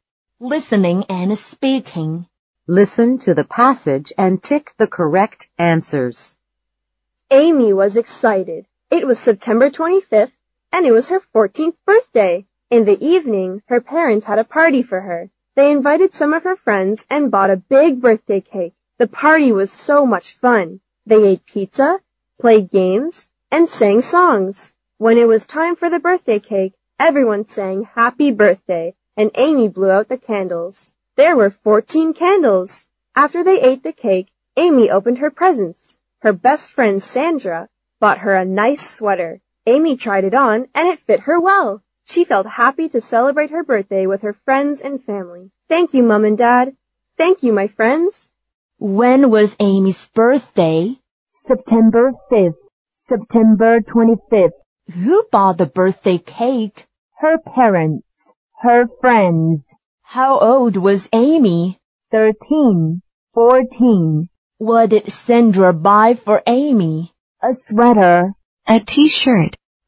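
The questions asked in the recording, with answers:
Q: When was Amy's birthday?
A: September 25th

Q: Who bought the birthday cake?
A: Her parents

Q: How old was Amy?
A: 14

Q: What did Sandra buy for Amy?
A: A sweater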